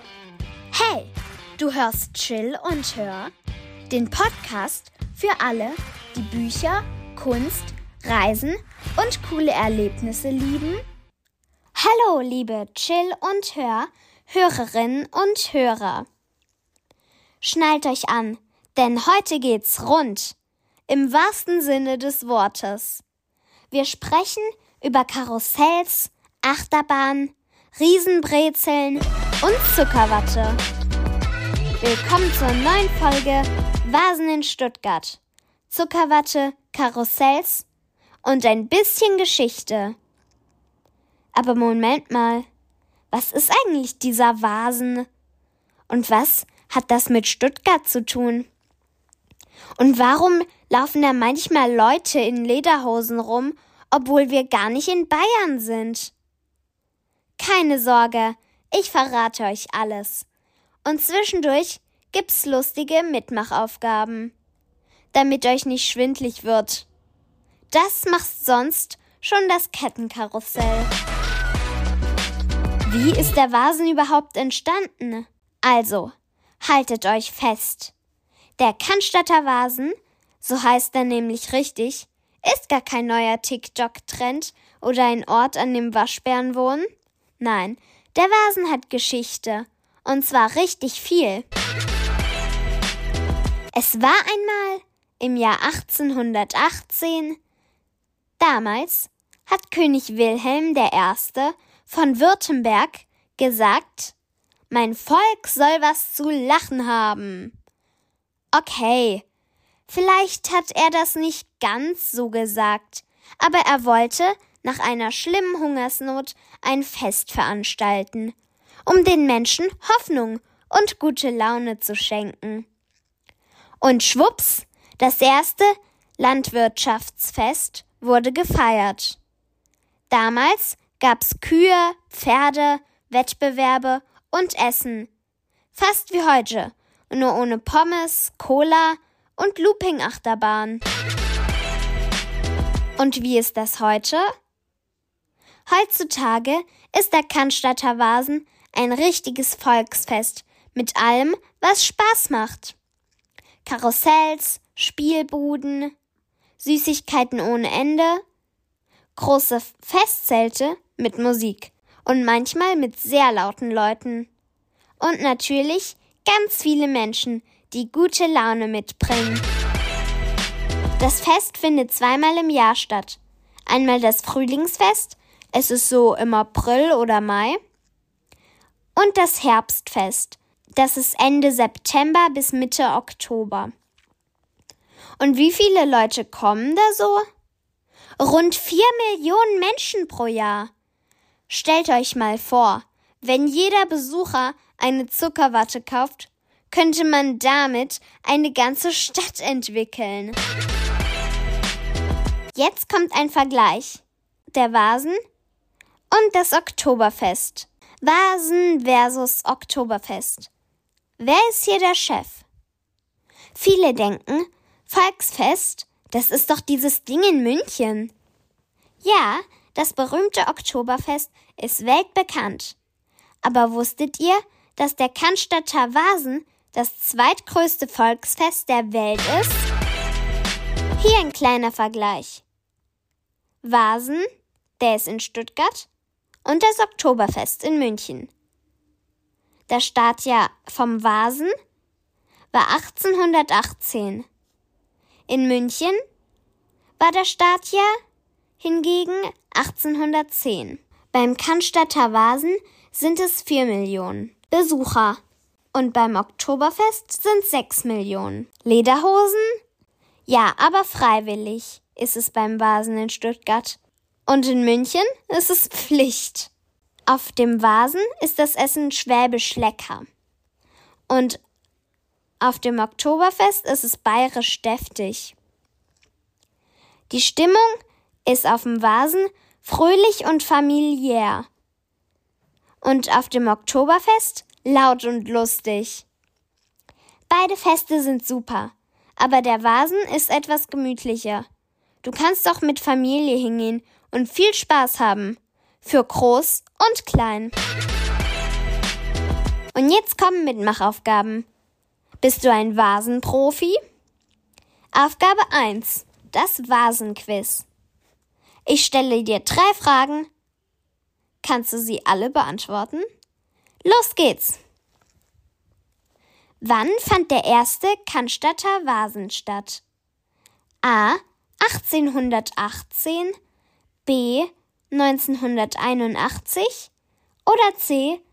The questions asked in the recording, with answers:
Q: Wann fand der erste Cannstatter Vasen statt?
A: Richtig ist Antwort A. 1818.